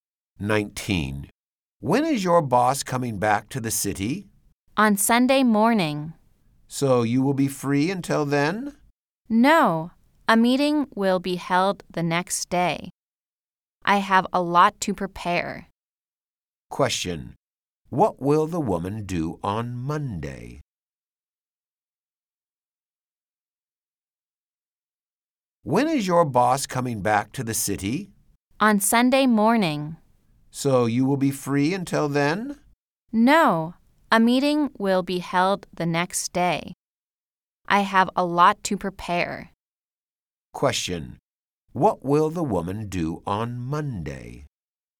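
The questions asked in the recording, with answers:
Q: Question. What will the woman do on Monday?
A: Attend a meeting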